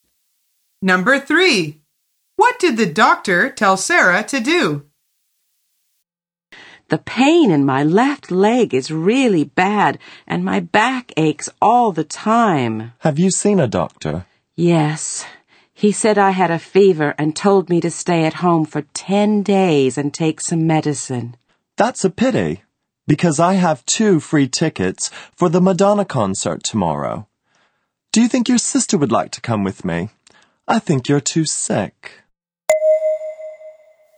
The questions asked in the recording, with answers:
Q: What did the doctor tell Sarah to do?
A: The answer is stay at home for 10 days and take some medicine.